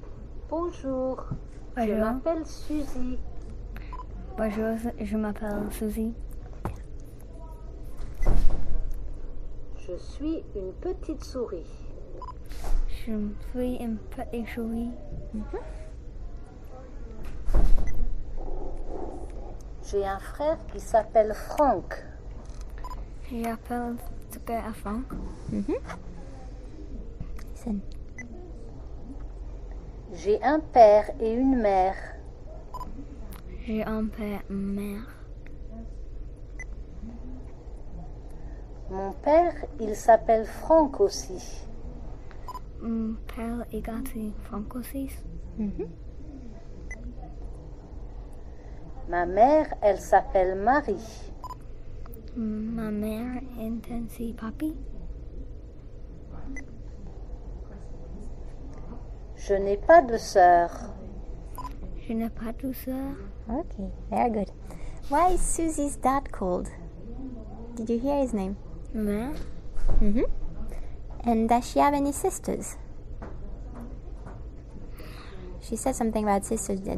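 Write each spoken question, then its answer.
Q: Why is Susie's dad called?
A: Franck

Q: And does she have any sisters?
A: No, she has no sisters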